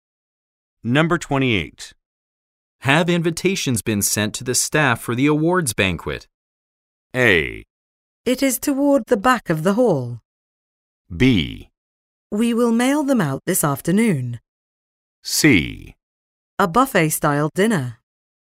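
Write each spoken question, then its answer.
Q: Have invitations been sent to the staff for the awards banquet?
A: B: We will mail them out this afternoon.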